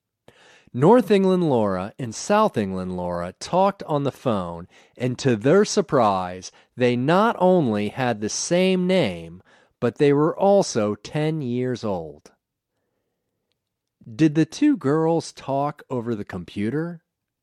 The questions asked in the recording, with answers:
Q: Did the two girls talk over the computer?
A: No, they didn't talk over the computer.